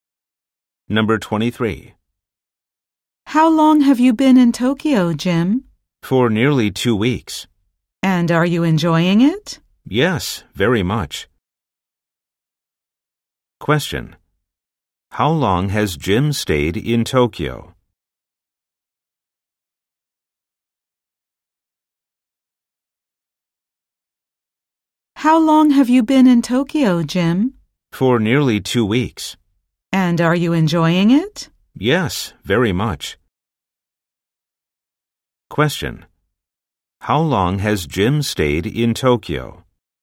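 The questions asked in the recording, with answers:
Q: How long has Jim stayed in Tokyo?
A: For nearly 2 weeks.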